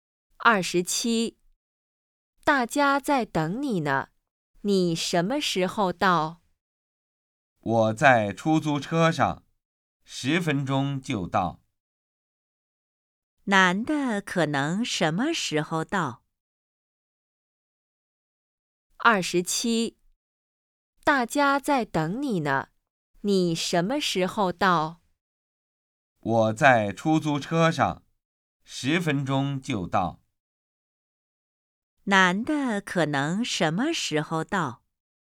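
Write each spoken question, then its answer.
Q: 男的可能什么时候到?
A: 10分钟后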